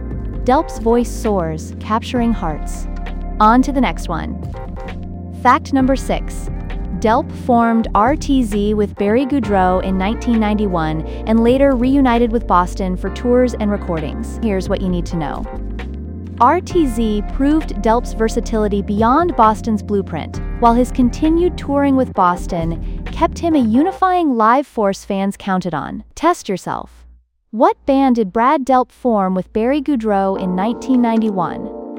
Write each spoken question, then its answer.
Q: What band did Brad Delp form with Barry Goudreau in 1991?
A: Correct answer, RTZ.